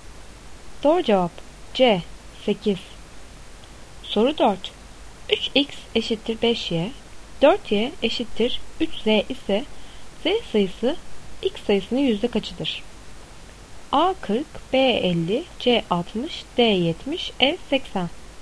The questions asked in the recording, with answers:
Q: 3x eşittir 5y, 4y eşittir 3z ise z sayısı x sayısının yüzde kaçıdır?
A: Doğru cevap E 80.